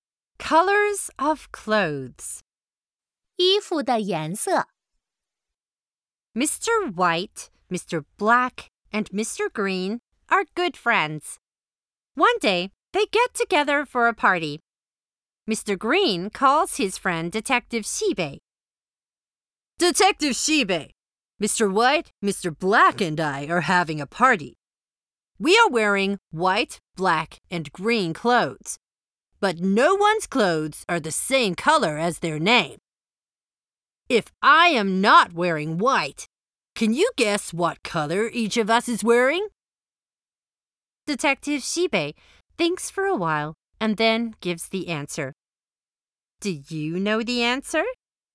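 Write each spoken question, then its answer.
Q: If I am not wearing white, can you guess what color each of us is wearing?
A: Mr. White wears green, Mr. Black wears white, and Mr. Green wears black.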